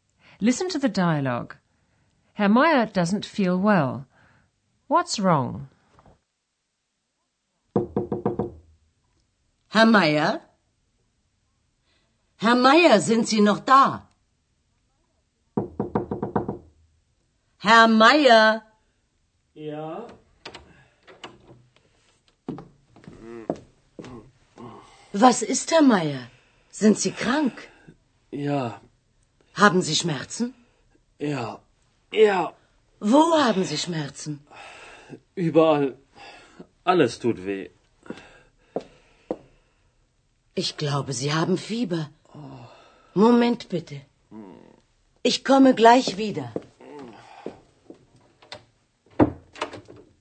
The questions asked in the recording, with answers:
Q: What's wrong?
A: As you've probably realized, Herr Meyer is lying in bed and he's in pain.